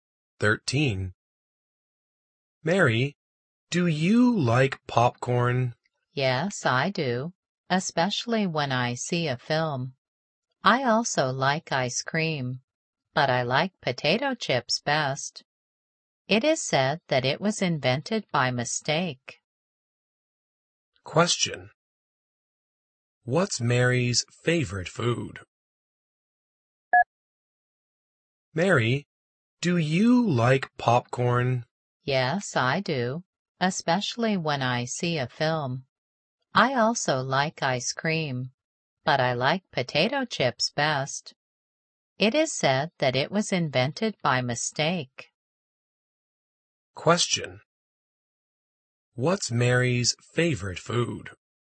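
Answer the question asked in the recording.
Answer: Potato chips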